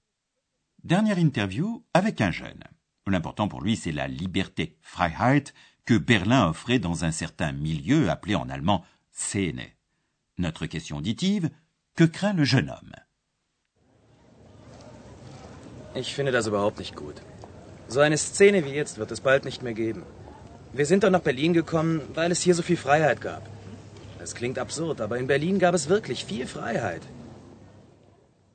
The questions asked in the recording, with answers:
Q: que craint le jeune homme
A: le jeune homme craint que bientôt il n'y ait plus un milieu comme actuellement.